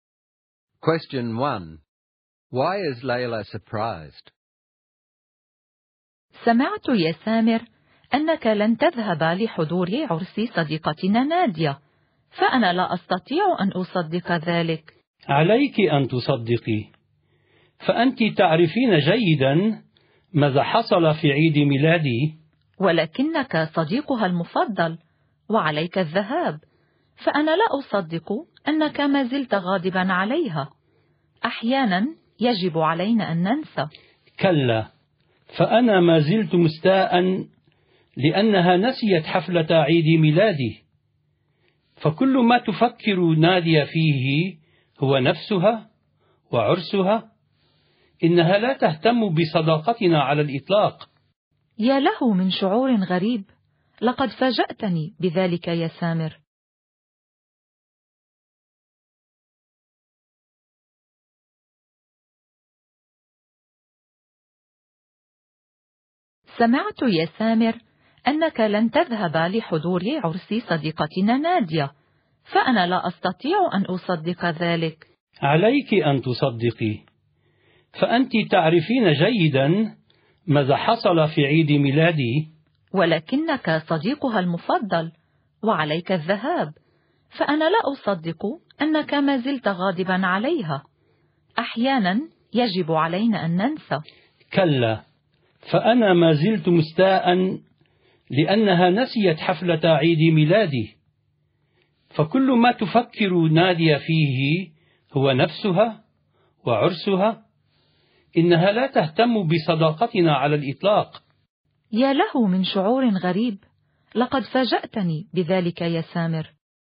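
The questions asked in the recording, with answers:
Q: Why is Layla surprised?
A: Samer won't go to Nadia's wedding, though he is her best friend, because he is still angry she forgot his birthday party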